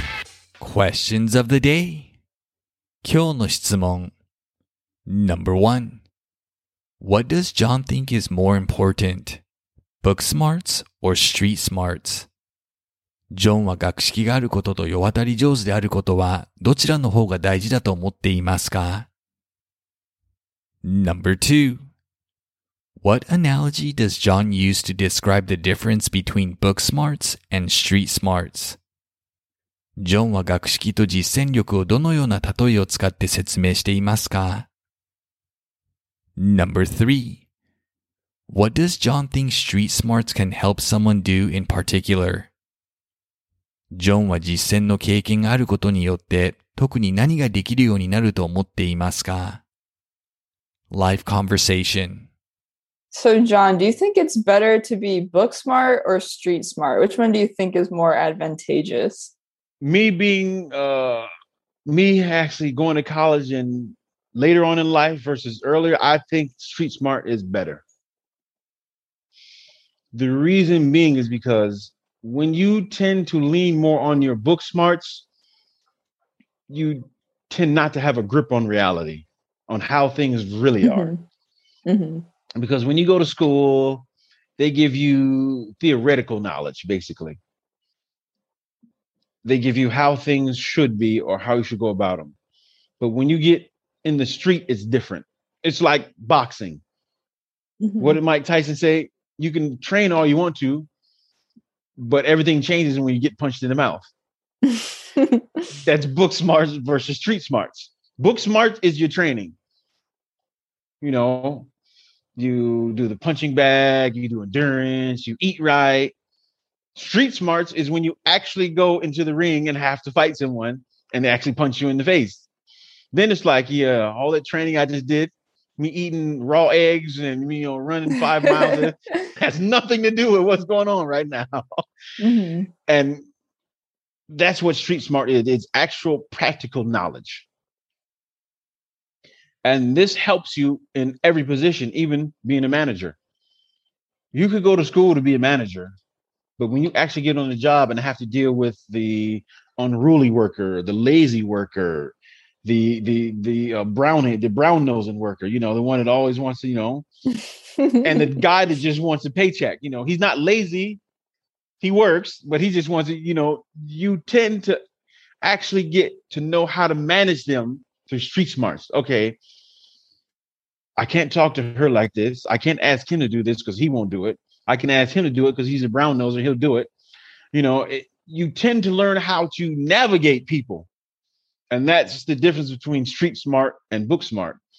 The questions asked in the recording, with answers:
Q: What does John think is more important? Book smarts or street smarts?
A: John thinks street smarts are more important than book smarts.

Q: What analogy does John use to describe the difference between book smarts and street smarts?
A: John uses boxing as an analogy.

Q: What does John think street smarts can help someone do in particular?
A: In particular,John thinks street smarts help someone know how to navigate other people around him, such as coworkers or employees on the job.